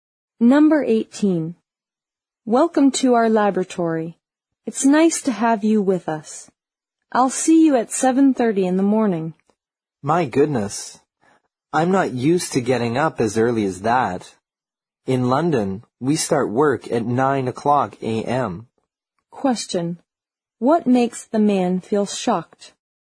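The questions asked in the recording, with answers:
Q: What makes the man feel shocked?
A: He has to start work at 7:30 in the morning.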